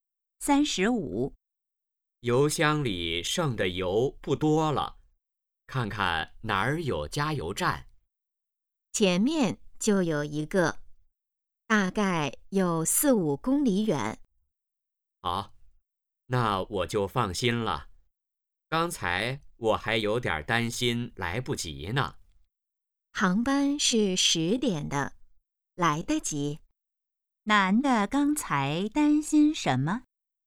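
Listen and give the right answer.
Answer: 担心来不及赶上10点的航班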